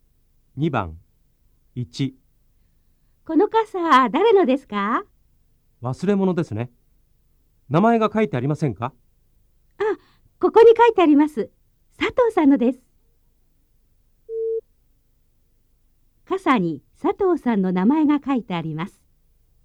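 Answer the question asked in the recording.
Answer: はい(正しい)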